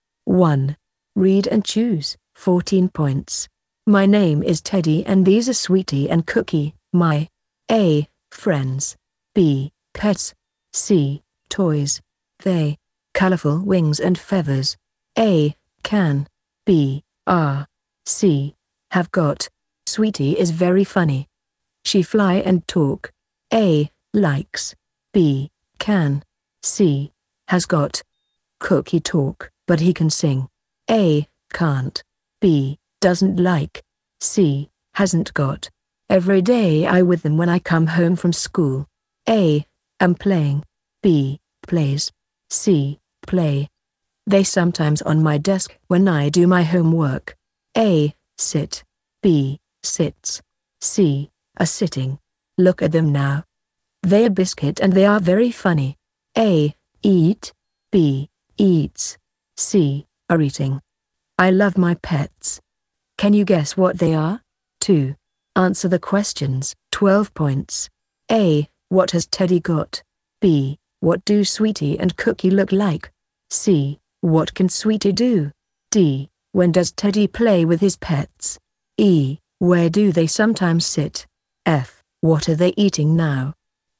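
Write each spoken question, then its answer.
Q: What has Teddy got?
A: Two pets, Sweetie and Cookie

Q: What do Sweetie and Cookie look like?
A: They have colorful wings and feathers

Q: What can Sweetie do?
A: She can fly and talk

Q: When does Teddy play with his pets?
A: Every day when he comes home from school

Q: Where do they sometimes sit?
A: On Teddy's desk

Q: What are they eating now?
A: Biscuits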